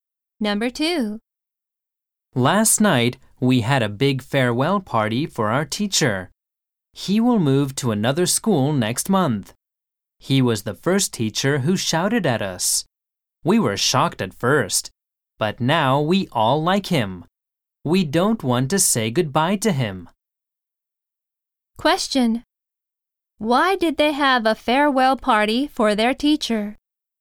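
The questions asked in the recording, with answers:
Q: Why did they have a farewell party for their teacher?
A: Because he will move to another school next month.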